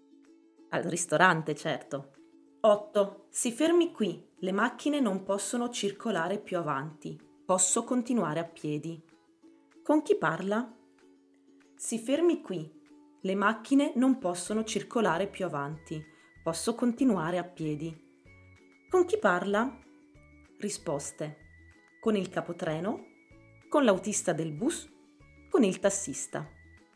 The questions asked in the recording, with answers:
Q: Con chi parla?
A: Con il tassista, certo.